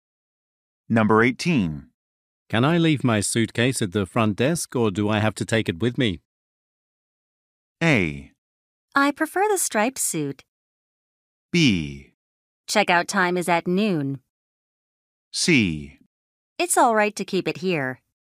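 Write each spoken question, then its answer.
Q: Can I leave my suitcase at the front desk or do I have to take it with me?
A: C: It's all right to keep it here.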